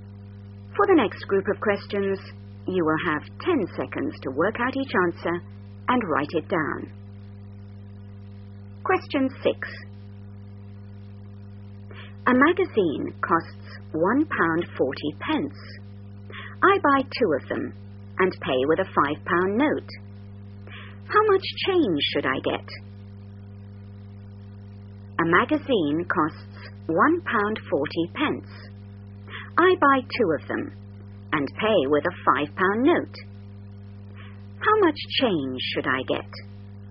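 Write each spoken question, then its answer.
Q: How much change should I get?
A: £2.20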